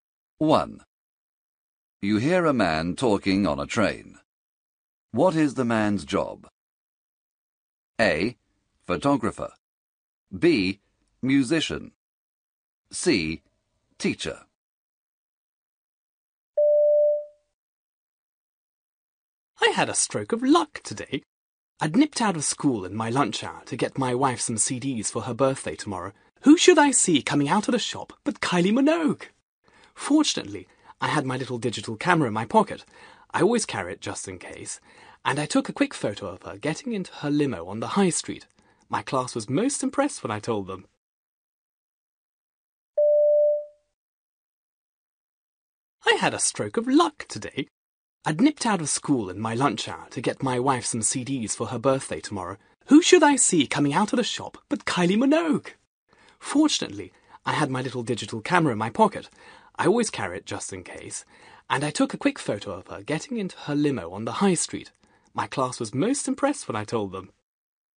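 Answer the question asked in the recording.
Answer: C: Teacher.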